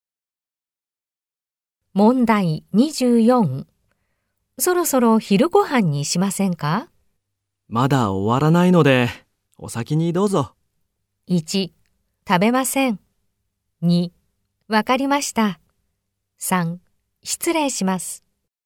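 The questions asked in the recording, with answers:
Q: そろそろ昼ご飯にしませんか?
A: 1: わかりました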